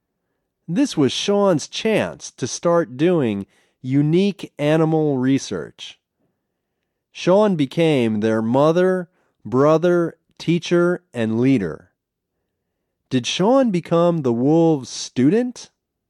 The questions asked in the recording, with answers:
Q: Did Sean become the wolves' student?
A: No, he didn't become the wolves' student.